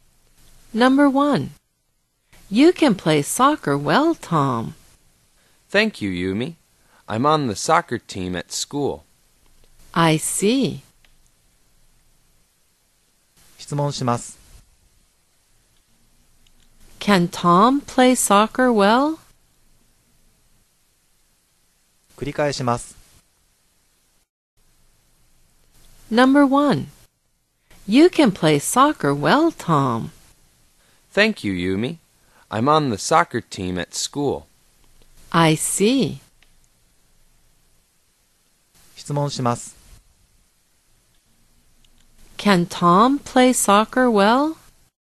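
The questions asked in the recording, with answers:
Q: Can Tom play soccer well?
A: Yes, he can.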